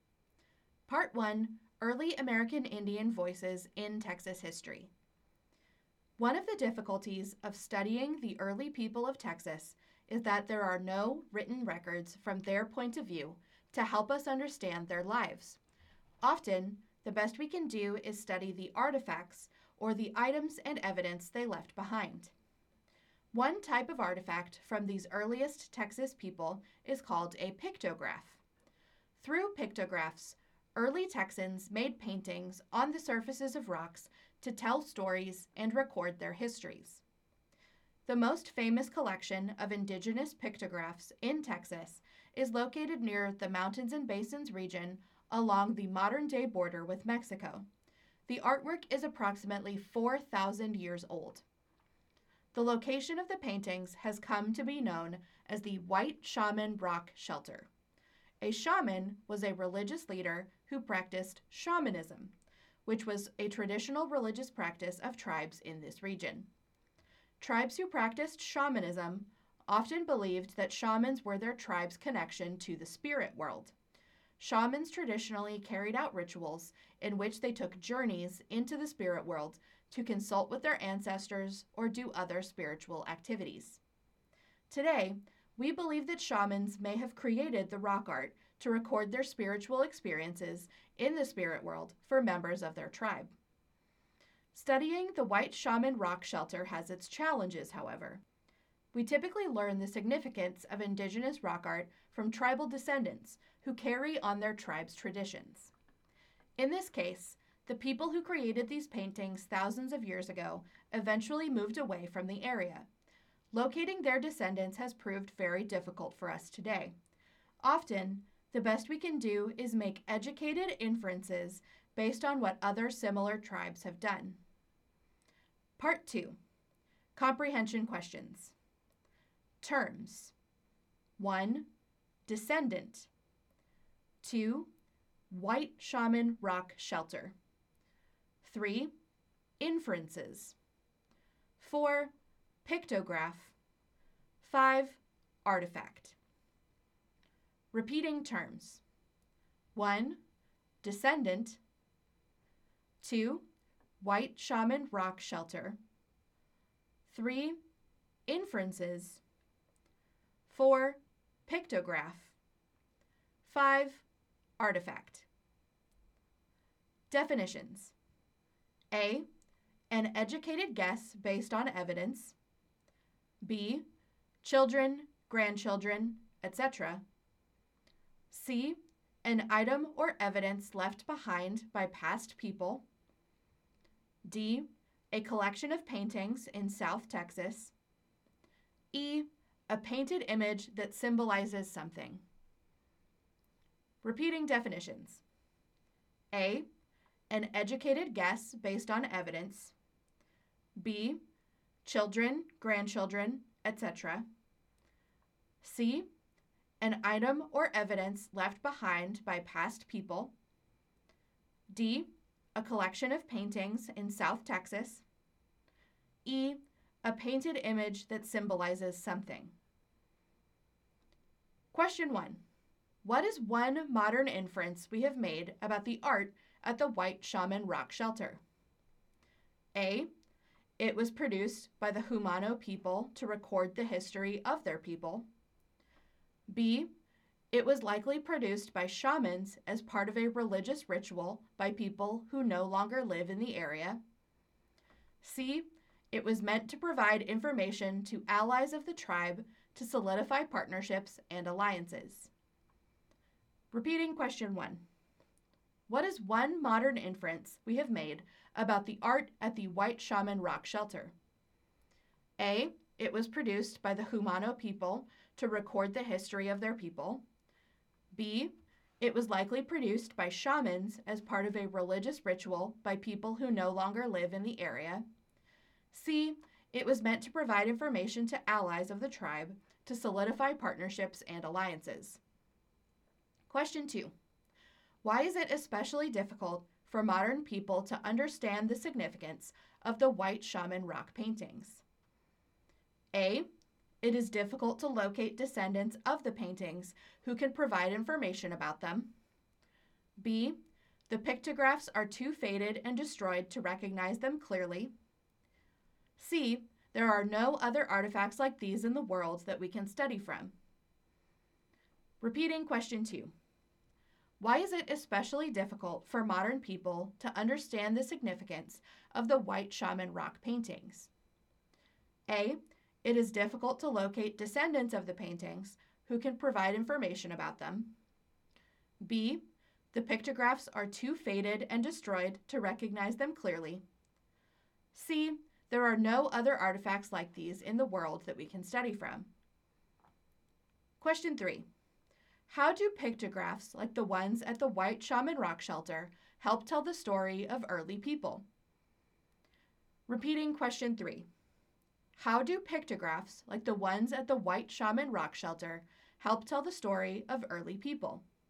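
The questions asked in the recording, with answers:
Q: What is one modern inference we have made about the art at the White Shaman Rock Shelter?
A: B: it was likely produced by shamans as part of a religious ritual by people who no longer live in the area

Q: Why is it especially difficult for modern people to understand the significance of the White Shaman rock paintings?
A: A: It is difficult to locate descendants of the paintings who can provide information about them

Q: How do pictographs like the ones at the White Shaman Rock Shelter help tell the story of early people?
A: They are paintings on rock that told stories and recorded the people's histories and spiritual experiences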